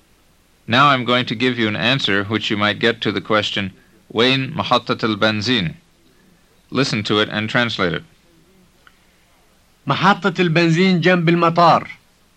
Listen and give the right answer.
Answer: It means the gas station is next to the airport.